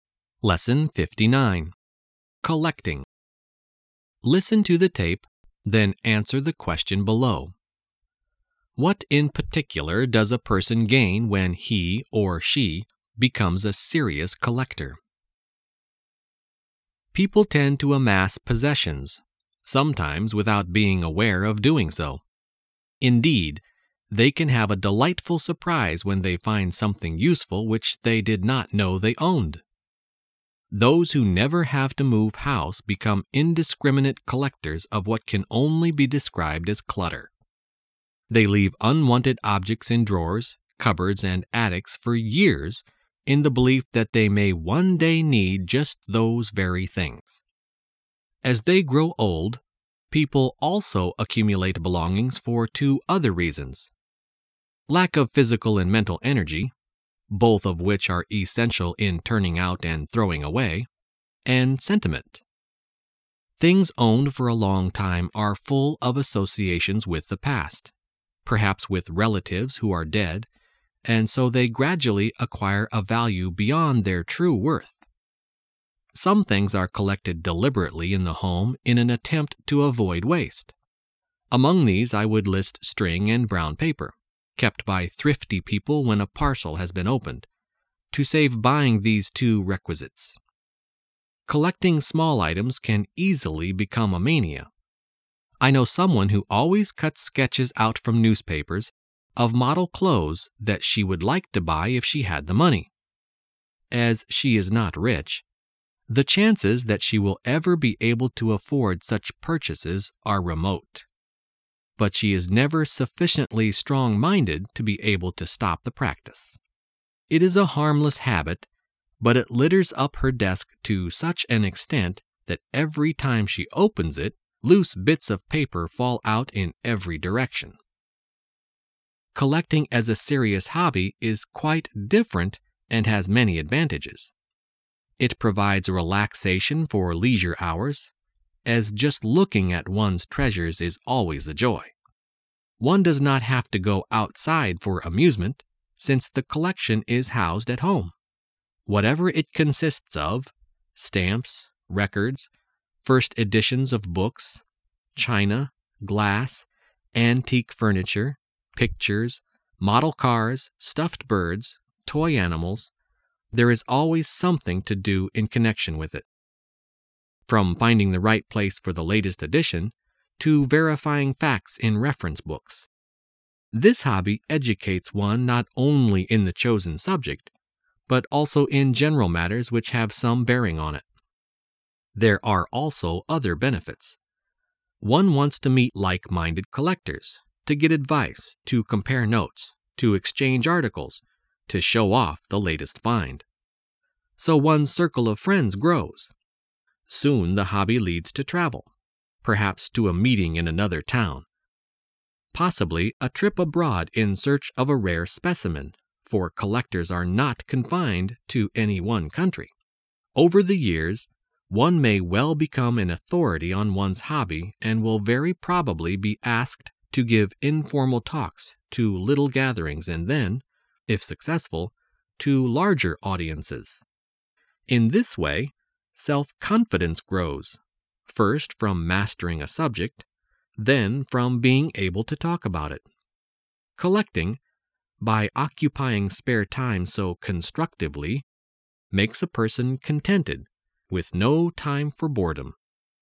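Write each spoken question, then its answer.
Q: What in particular does a person gain when he or she becomes a serious collector?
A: Self-confidence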